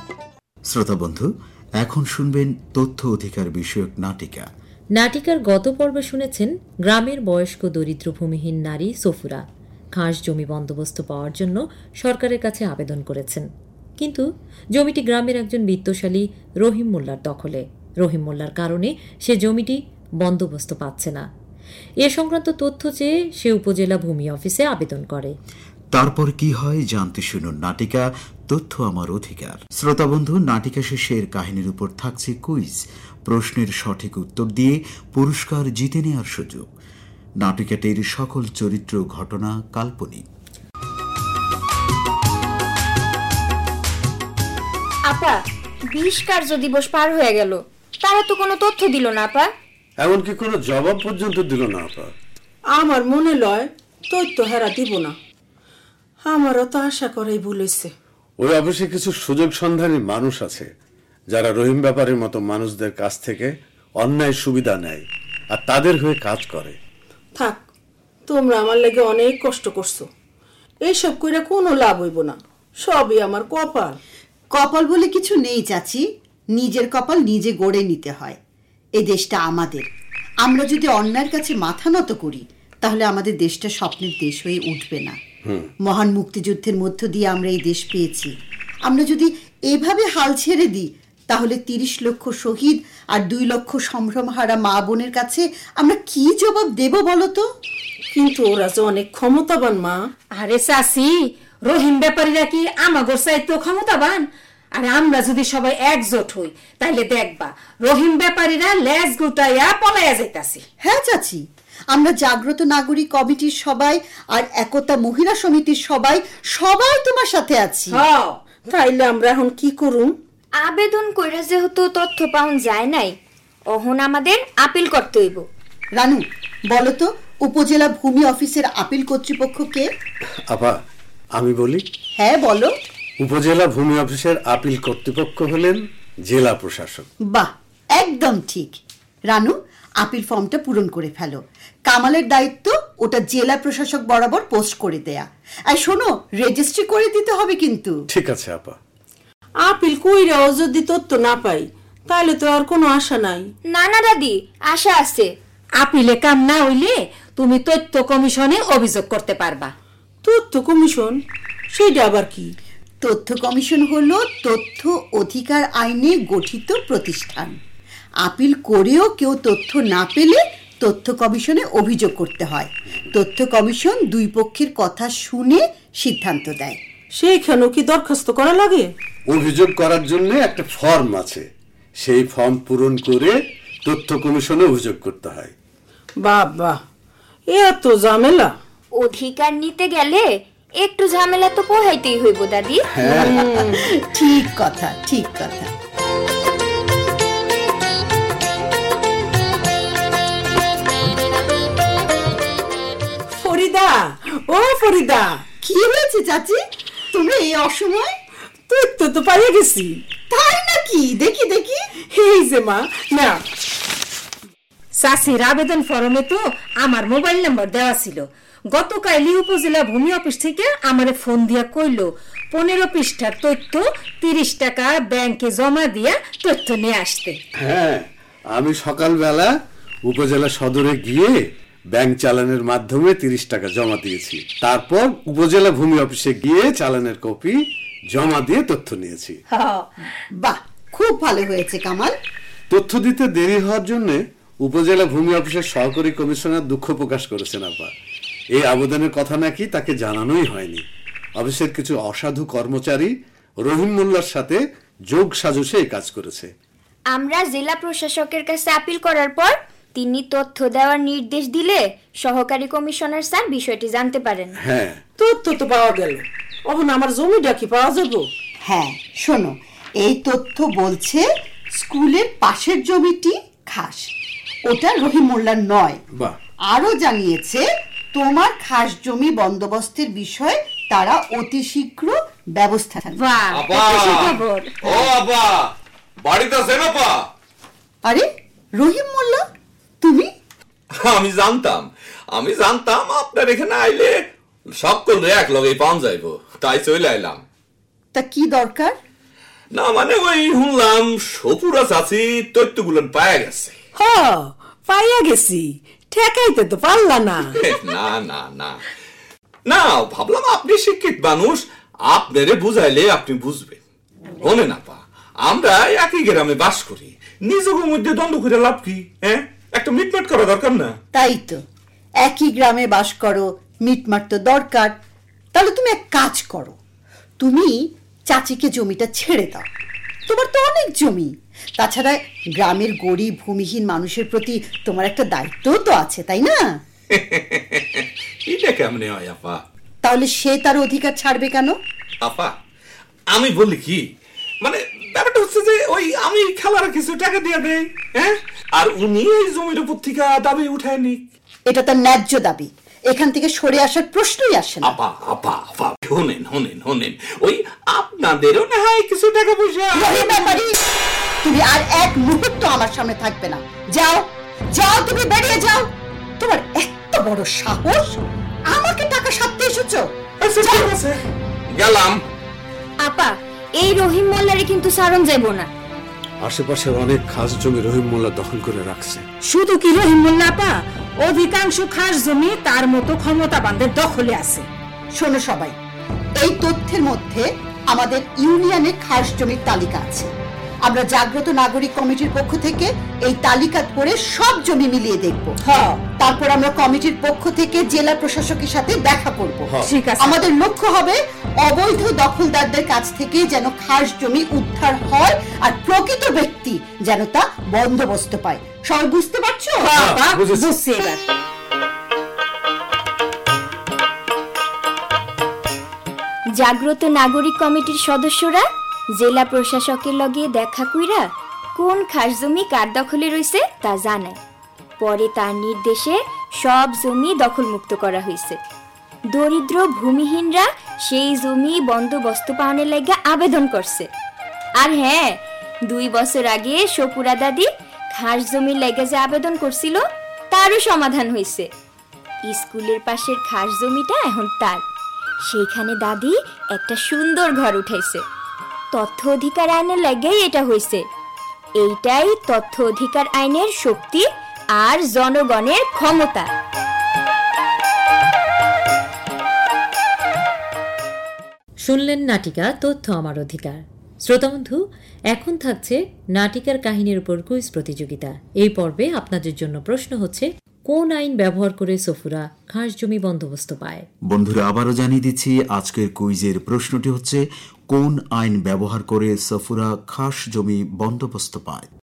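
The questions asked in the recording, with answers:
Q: কোন আইন ব্যবহার করে সফুরা খাস জমি বন্দোবস্ত পায়?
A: তথ্য অধিকার আইন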